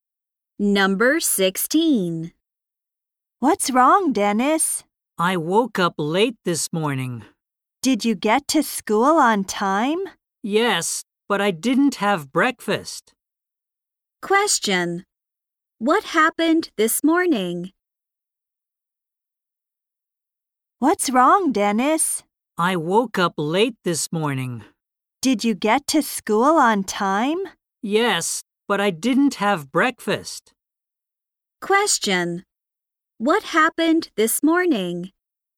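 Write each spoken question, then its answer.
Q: What happened this morning?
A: Dennis woke up late and didn't have breakfast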